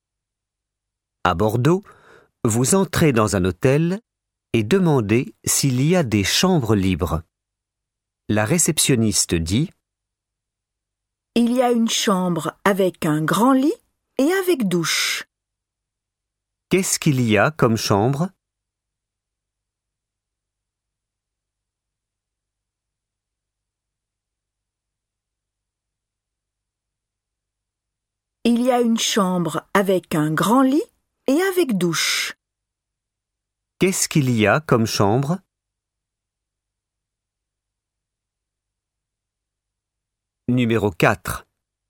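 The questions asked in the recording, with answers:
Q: Qu'est-ce qu'il y a comme chambre?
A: Une chambre avec un grand lit et avec douche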